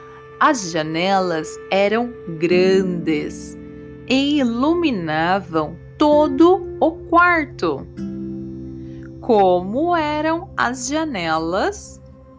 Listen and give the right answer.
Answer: Grandes e iluminavam todo o quarto.